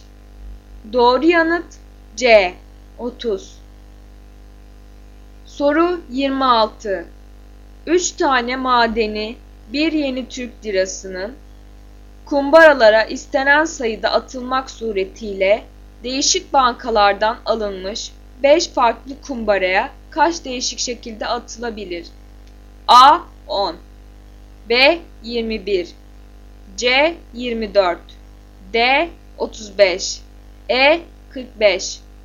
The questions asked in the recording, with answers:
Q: 3 tane madeni 1 yeni Türk lirasının kumbaralara istenen sayıda atılmak suretiyle değişik bankalardan alınmış 5 farklı kumbaraya kaç değişik şekilde atılabilir?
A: Doğru yanıt D 35.